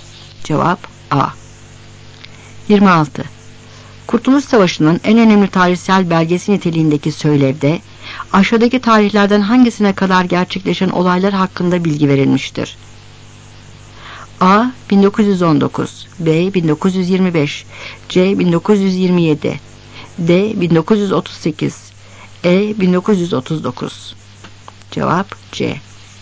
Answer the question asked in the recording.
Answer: Cevap C.